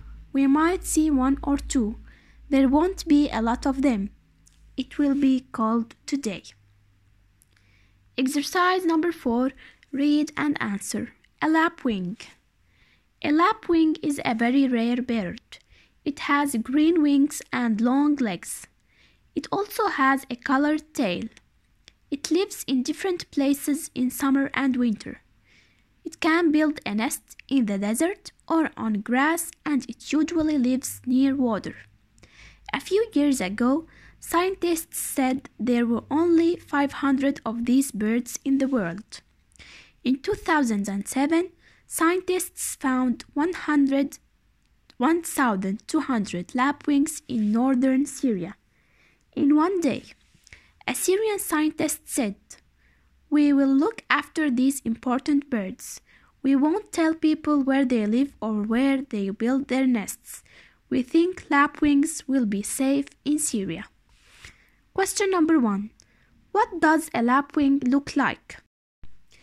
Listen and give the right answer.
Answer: it has green wings and long legs.